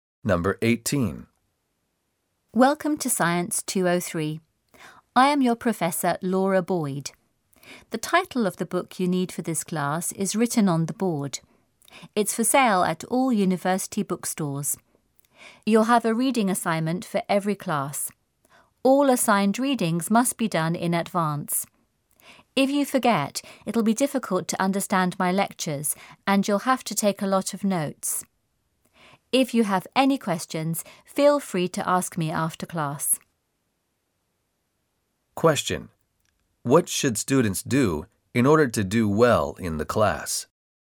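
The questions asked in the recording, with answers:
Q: What should students do in order to do well in the class?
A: Do the assigned readings before each class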